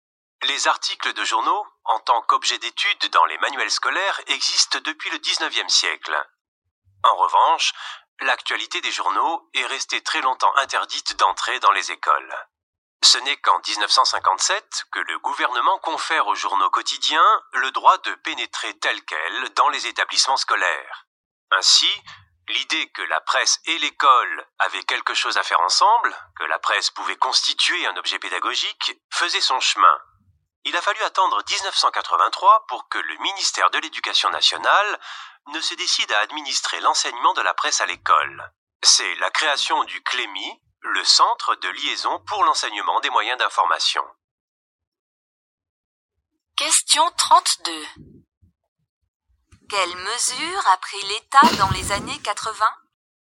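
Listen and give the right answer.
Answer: Il a organisé l'enseignement de la presse à l'école en créant le CLEMI (1983)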